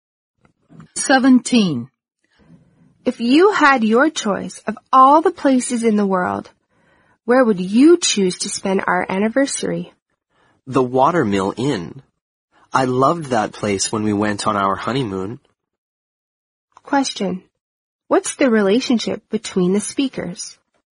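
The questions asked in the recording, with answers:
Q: What's the relationship between the speakers?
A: They are husband and wife.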